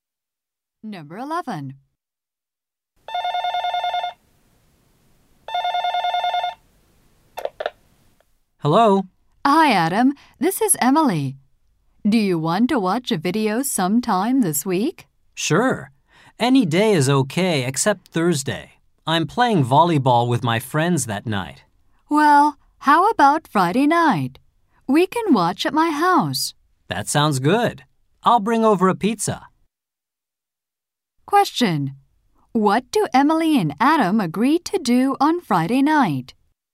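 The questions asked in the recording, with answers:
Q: What do Emily and Adam agree to do on Friday night?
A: Watch a video at Emily's house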